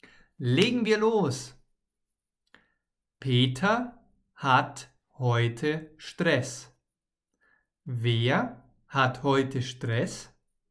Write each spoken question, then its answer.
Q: Wer hat heute Stress?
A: Peter. Peter hat heute Stress.